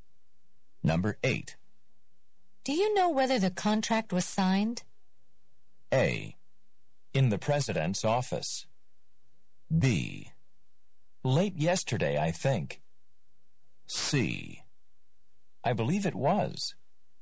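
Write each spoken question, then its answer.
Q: Do you know whether the contract was signed?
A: C: I believe it was.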